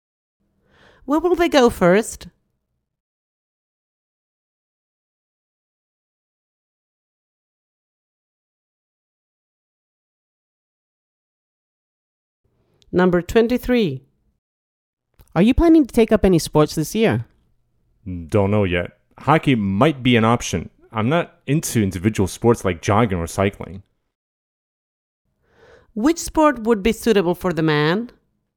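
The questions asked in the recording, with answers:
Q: Which sport would be suitable for the man?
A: Hockey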